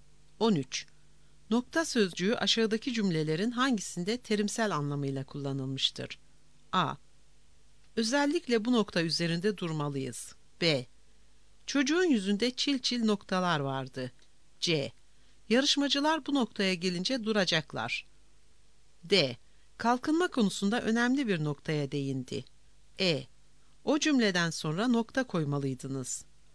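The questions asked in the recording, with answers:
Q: Nokta sözcüğü aşağıdaki cümlelerin hangisinde terimsel anlamıyla kullanılmıştır?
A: E: O cümleden sonra nokta koymalıydınız.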